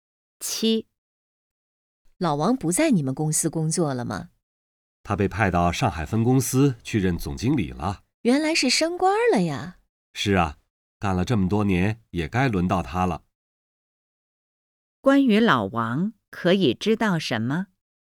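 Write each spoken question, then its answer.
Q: 关于老王可以知道什么?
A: 他升官了,被派到上海分公司任总经理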